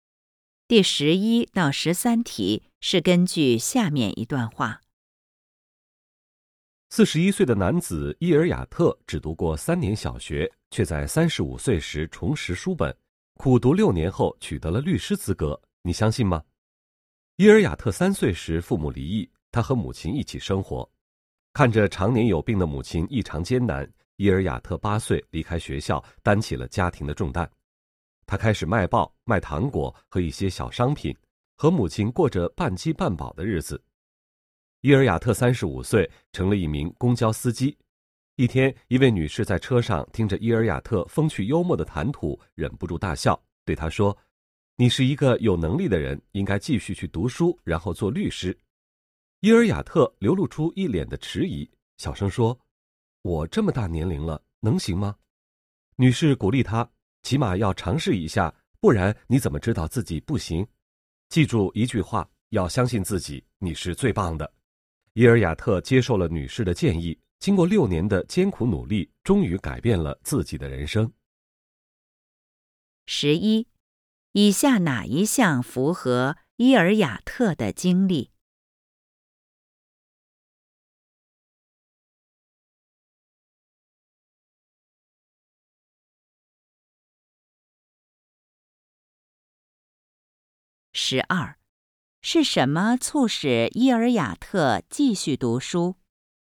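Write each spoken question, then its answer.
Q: 是什么促使伊尔雅特继续读书?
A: 一位女乘客的鼓励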